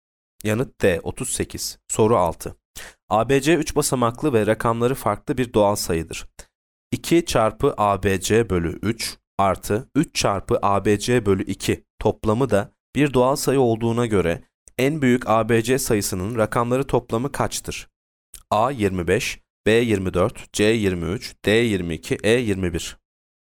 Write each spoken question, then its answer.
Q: 2 çarpı ABC bölü 3 artı 3 çarpı ABC bölü 2 toplamı da bir doğal sayı olduğuna göre en büyük ABC sayısının rakamları toplamı kaçtır?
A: Yanıt E 21.